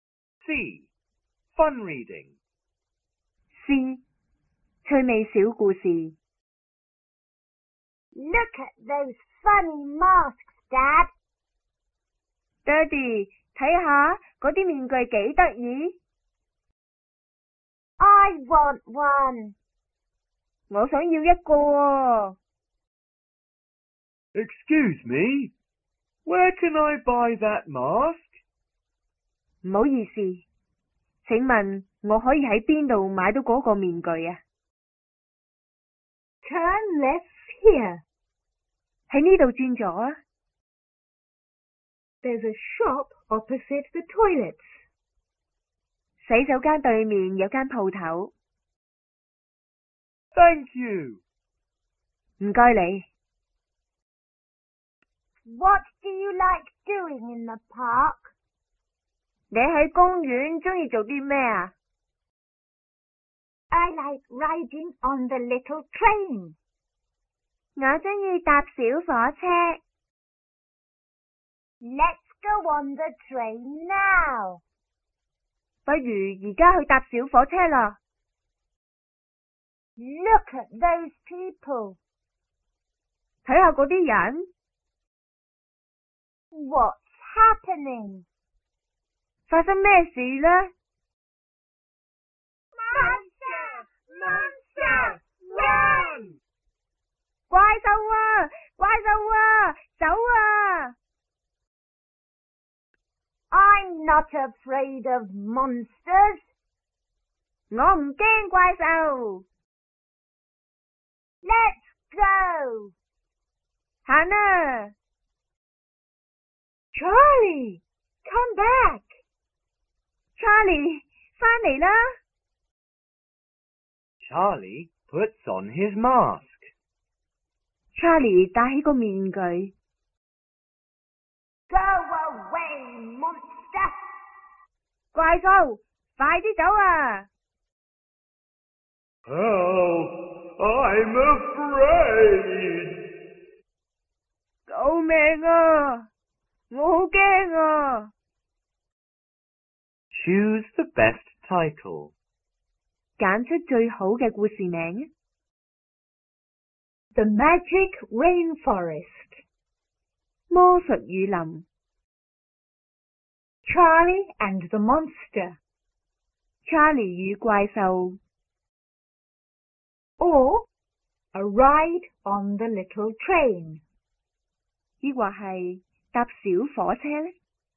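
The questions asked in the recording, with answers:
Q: Choose the best title.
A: Charlie and the Monster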